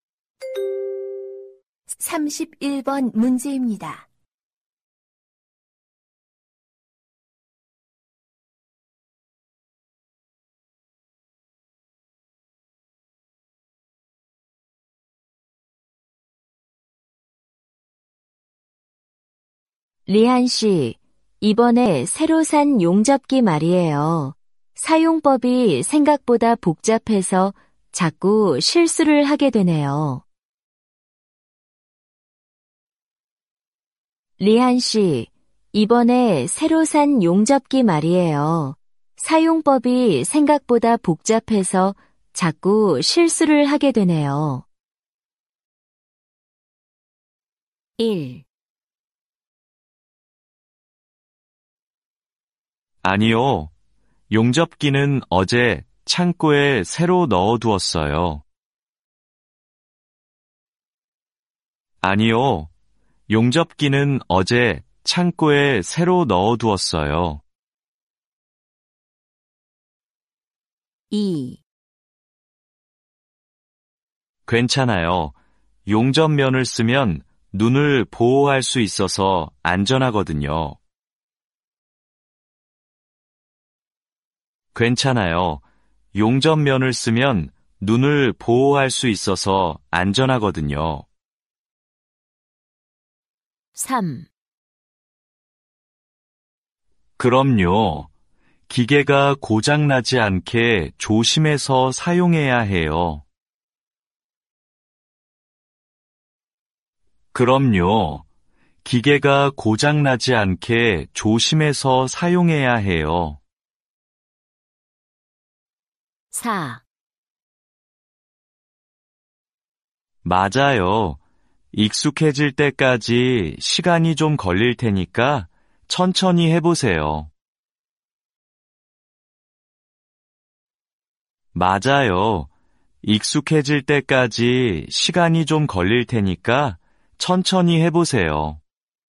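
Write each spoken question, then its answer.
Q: 리안 씨, 이번에 새로 산 용접기 말이에요. 사용법이 생각보다 복잡해서 자꾸 실수를 하게 되네요.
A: 4: 맞아요. 익숙해질 때까지 시간이 좀 걸릴 테니까 천천히 해보세요.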